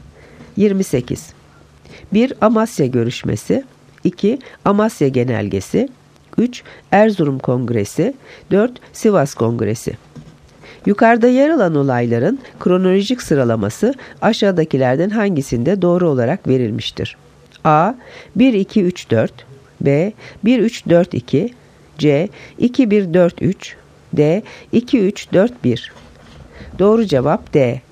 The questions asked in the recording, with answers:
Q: Yukarıda yer alan olayların kronolojik sıralaması aşağıdakilerden hangisinde doğru olarak verilmiştir?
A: Doğru cevap D. 2-3-4-1.